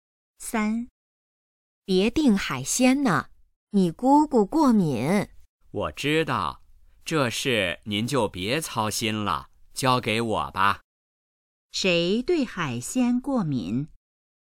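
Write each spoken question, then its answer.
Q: 谁对海鲜过敏?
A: 姑姑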